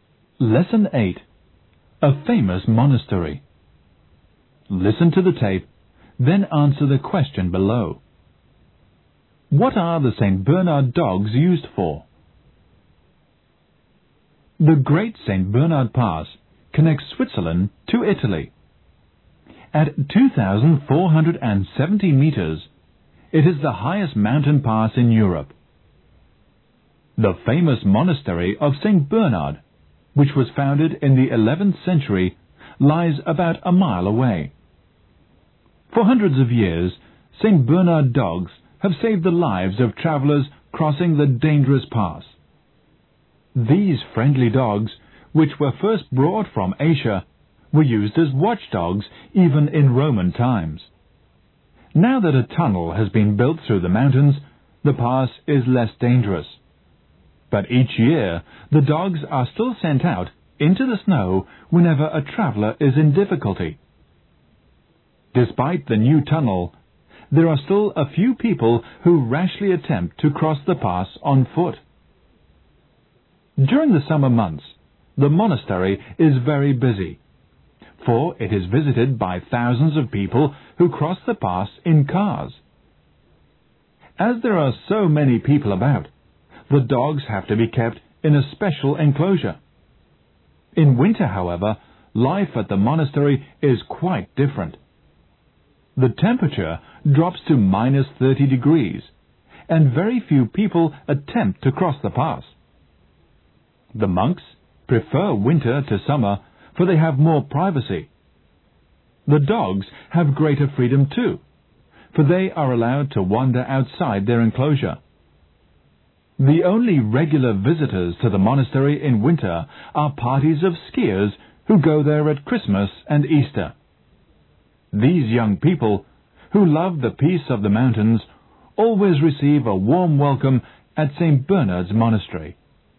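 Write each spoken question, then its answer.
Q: What are the St. Bernard dogs used for?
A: To save the lives of travelers crossing the dangerous pass (rescuing travelers in difficulty in the snow)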